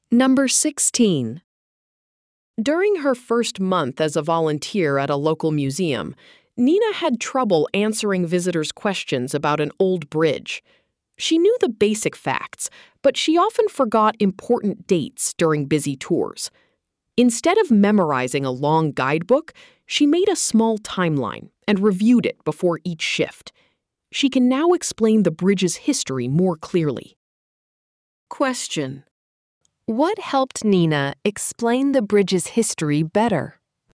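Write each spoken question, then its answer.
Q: What helped Nina explain the bridge's history better?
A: Reviewing a small timeline she made before each shift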